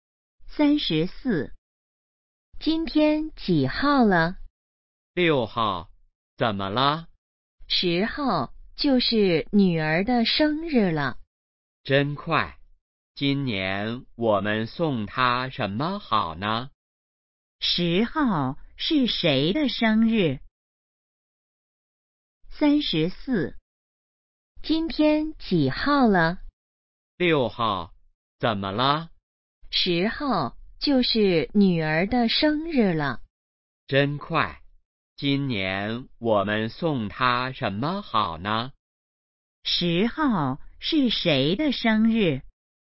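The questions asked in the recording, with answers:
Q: 10号是谁的生日?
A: 女儿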